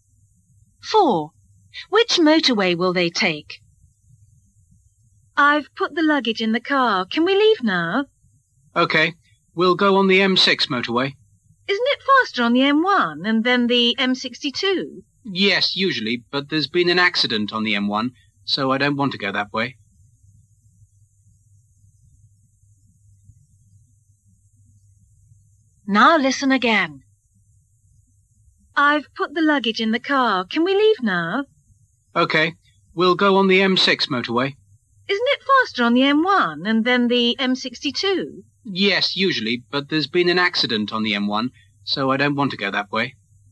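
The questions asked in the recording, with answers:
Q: Which motorway will they take?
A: The M6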